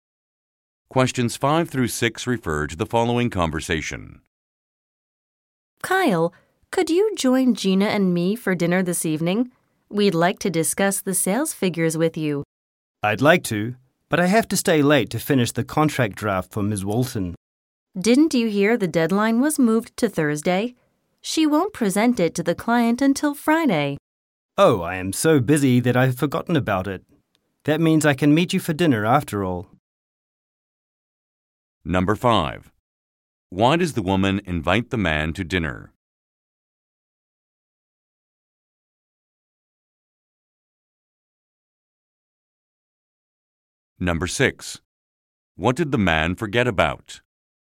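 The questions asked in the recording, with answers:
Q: Why does the woman invite the man to dinner?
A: To discuss the sales figures

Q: What did the man forget about?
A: That the deadline was moved to Thursday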